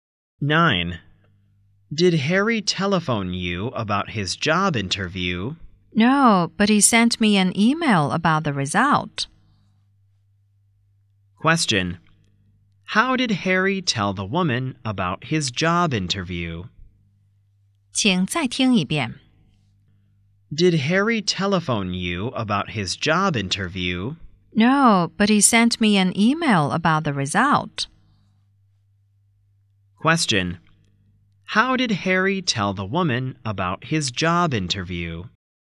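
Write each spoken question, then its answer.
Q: How did Harry tell the woman about his job interview?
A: By email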